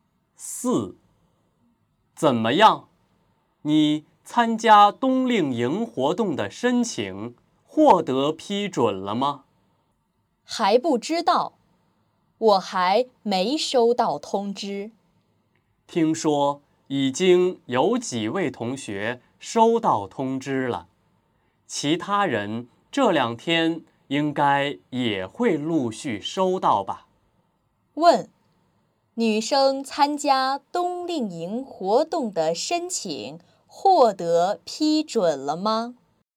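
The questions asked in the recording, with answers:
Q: 女生参加冬令营活动的申请获得批准了吗?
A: 还不知道,她还没收到通知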